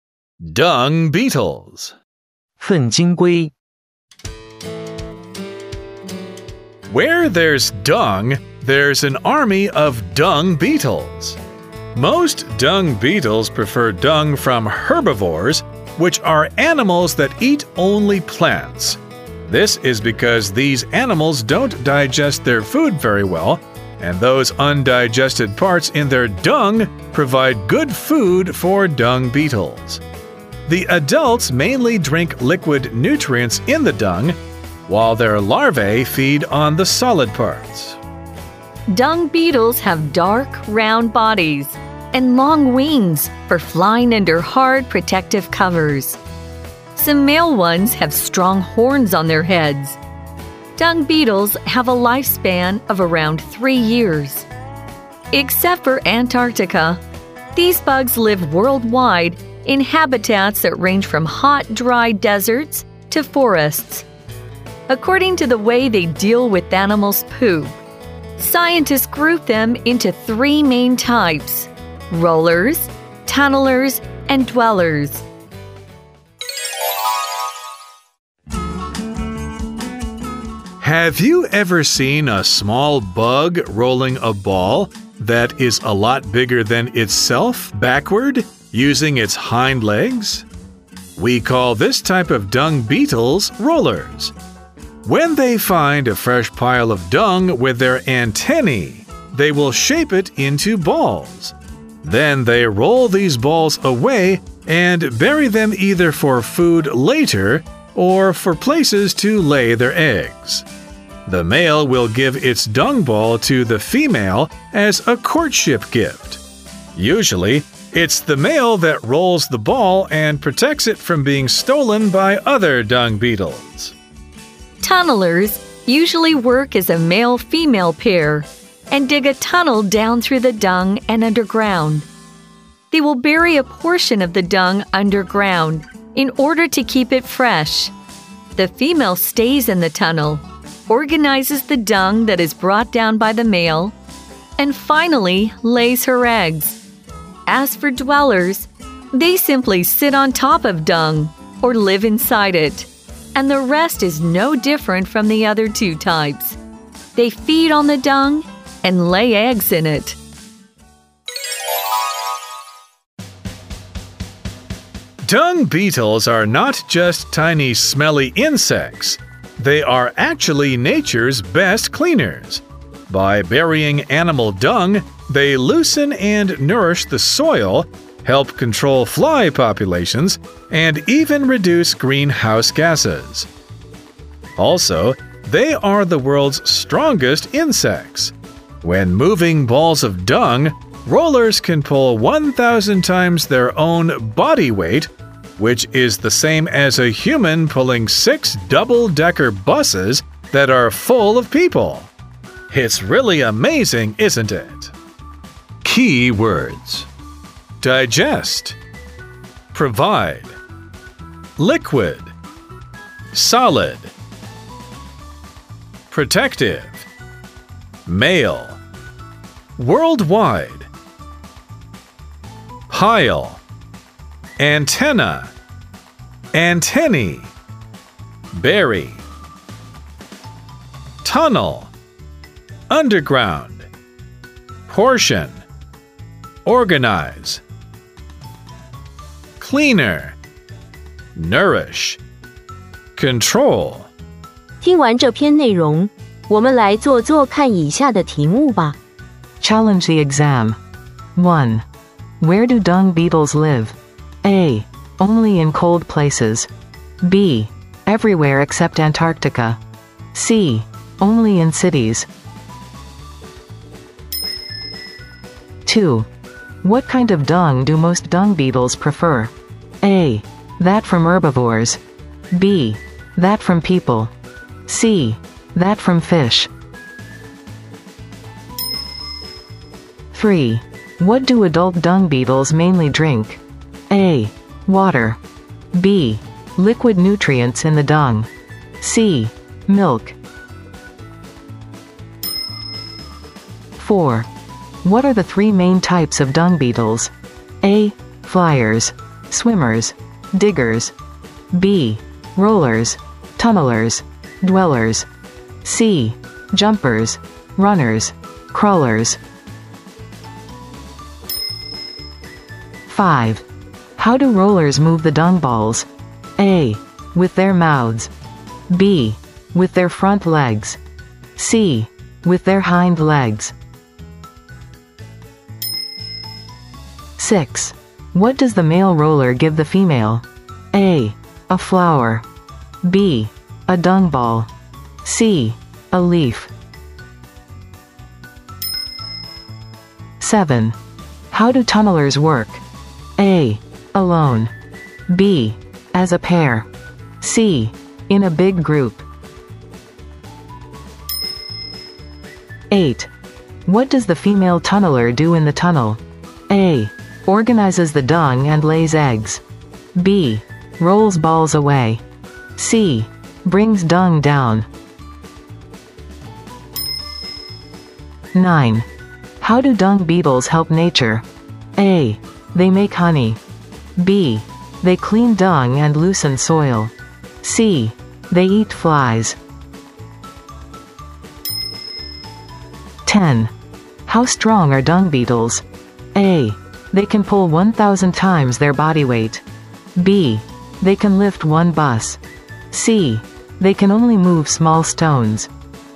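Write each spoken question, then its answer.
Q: Where do dung beetles live?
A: B: Everywhere except Antarctica.

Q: What kind of dung do most dung beetles prefer?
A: A: That from herbivores.

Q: What do adult dung beetles mainly drink?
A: B: liquid nutrients in the dung.

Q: What are the three main types of dung beetles?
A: B: Rollers. Tunnelers. Dwellers.

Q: How do rollers move the dung balls?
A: C: With their hind legs.

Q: What does the male roller give the female?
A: B: A dung ball.

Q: How do tunnelers work?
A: B: As a pair.

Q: What does the female tunneler do in the tunnel?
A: A: Organizes the dung and lays eggs.

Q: How do dung beetles help nature?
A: B: They clean dung and loosen soil.

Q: How strong are dung beetles?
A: A: They can pull 1,000 times their body weight.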